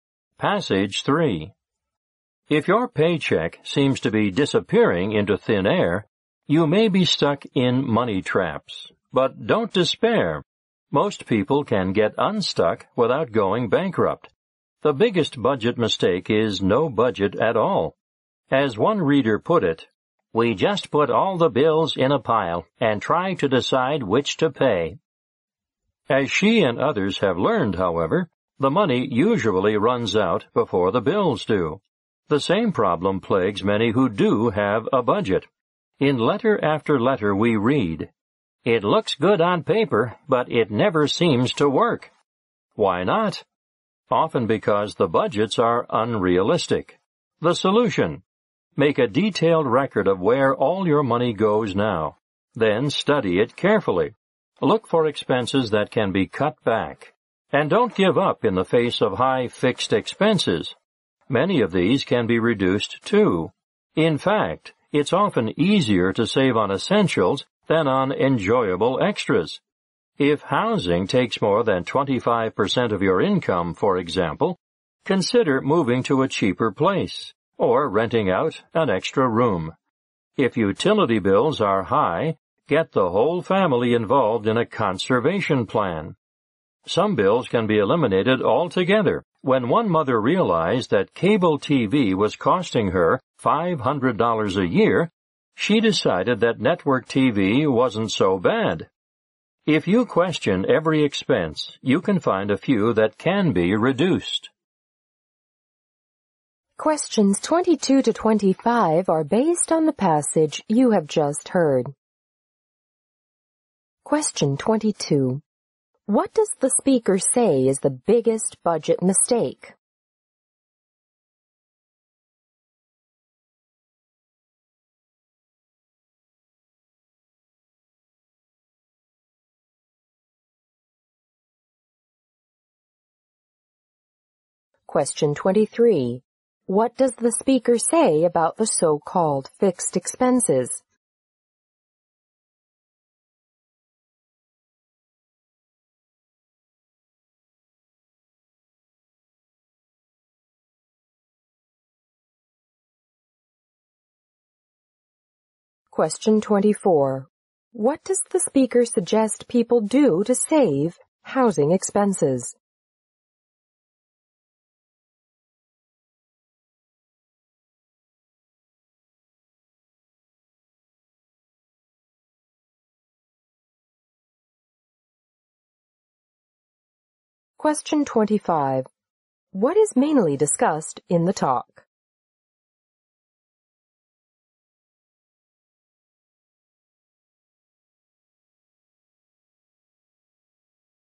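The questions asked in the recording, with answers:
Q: What does the speaker say is the biggest budget mistake?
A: Having no budget at all.

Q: What does the speaker say about the so-called fixed expenses?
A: Many of them can be reduced too.

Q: What does the speaker suggest people do to save housing expenses?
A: Move to a cheaper place or rent out an extra room.

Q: What is mainly discussed in the talk?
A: How to get out of money traps by budgeting and cutting expenses.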